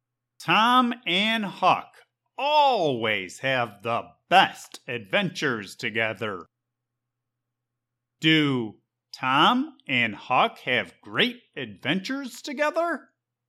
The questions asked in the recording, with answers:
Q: Do Tom and Huck have great adventures together?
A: Yep. Tom and Huck always have the best adventures together.